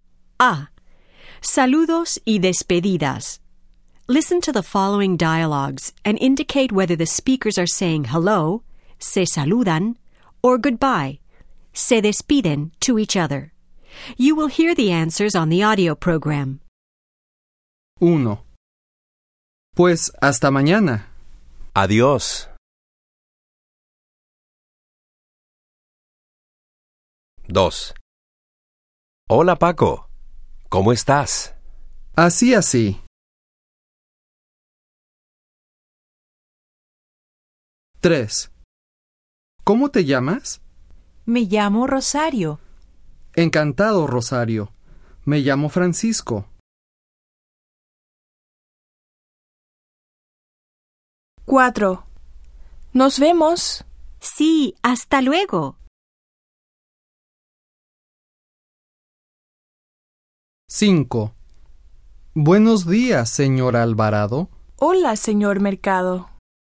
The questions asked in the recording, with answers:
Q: Pues hasta mañana.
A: 1. Se despiden.

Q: Hola, Paco. ¿Cómo estás?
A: 2. Se saludan.

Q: ¿Cómo te llamas?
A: 3. Se saludan.

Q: Nos vemos.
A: 4. Se despiden.

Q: Buenos días, señor Alvarado.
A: 5. Se saludan.